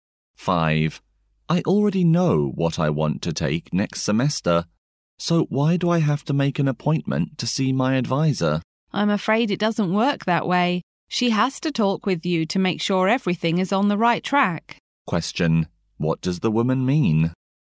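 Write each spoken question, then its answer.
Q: what does the woman mean?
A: He still has to meet his advisor to check his plan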